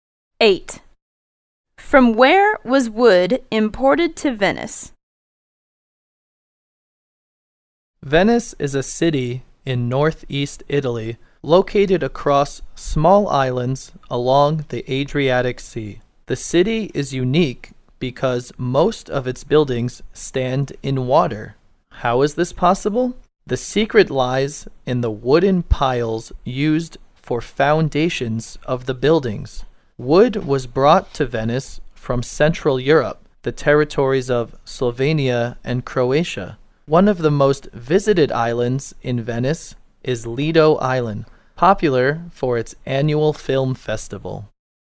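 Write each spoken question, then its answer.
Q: From where was wood imported to Venice?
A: From Central Europe (Slovenia and Croatia)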